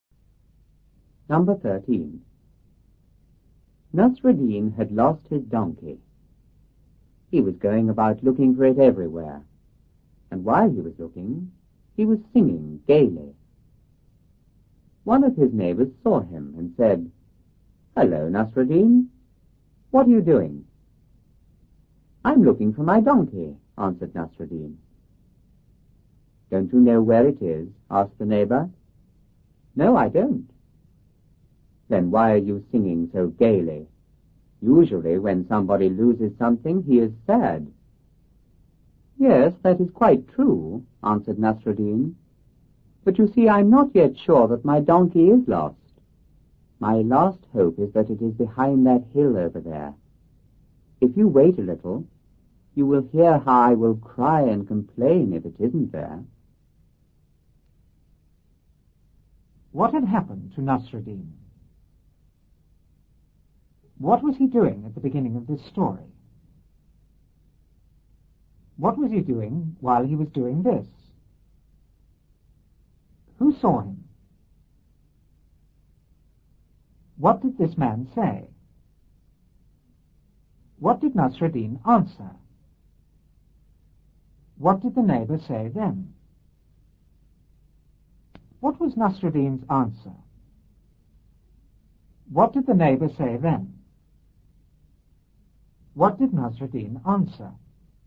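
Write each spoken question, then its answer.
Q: What had happened to Nasreddin?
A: He had lost his donkey.

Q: What was he doing at the beginning of this story?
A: Looking for his donkey everywhere.

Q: What was he doing while he was doing this?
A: Singing gaily.

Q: Who saw him?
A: One of his neighbors.

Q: What did this man say?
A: "Hello, Nasreddin. What are you doing?"

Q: What did Nasreddin answer?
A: "I'm looking for my donkey."

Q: What did the neighbor say then?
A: "Don't you know where it is?"

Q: What was Nasreddin's answer?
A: "No, I don't."

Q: What did the neighbor say then?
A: "Then why are you singing so gaily? Usually when somebody loses something, he is sad."

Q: What did Nasreddin answer?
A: He wasn't sure yet that his donkey was lost; his last hope was that it was behind the hill, and he would cry if it wasn't there.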